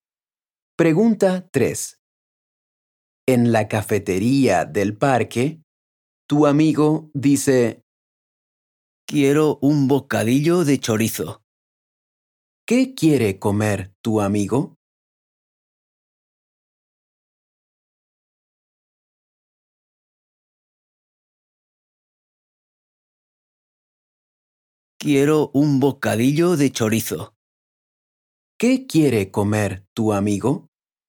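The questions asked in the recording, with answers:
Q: ¿Qué quiere comer tu amigo?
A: un bocadillo de chorizo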